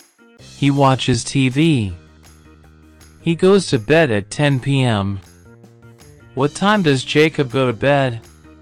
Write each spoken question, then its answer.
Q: What time does Jacob go to bed?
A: 10 p.m. He goes to bed at 10 p.m.